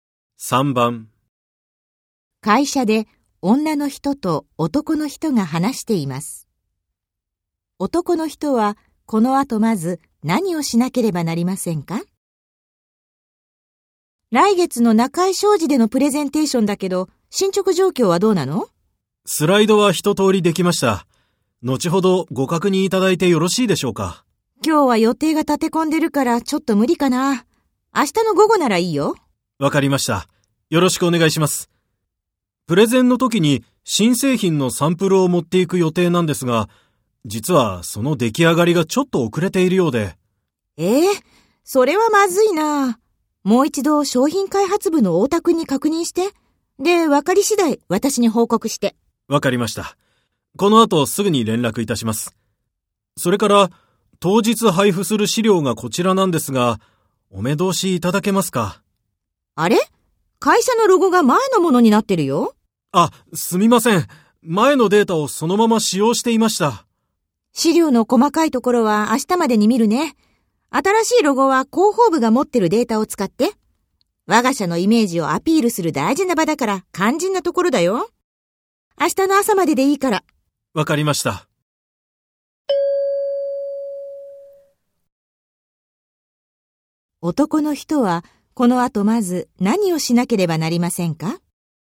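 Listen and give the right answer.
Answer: 商品開発部の大田さんに新製品サンプルの出来上がりを確認する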